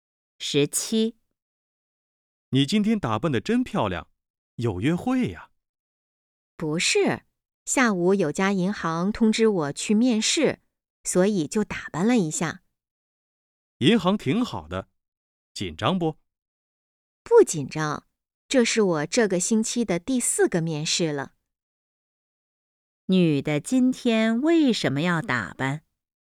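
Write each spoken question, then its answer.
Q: 女的今天为什么要打扮?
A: 下午要去银行面试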